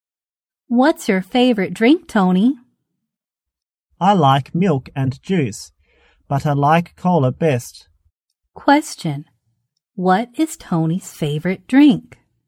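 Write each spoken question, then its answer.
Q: What is Tony's favorite drink?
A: Cola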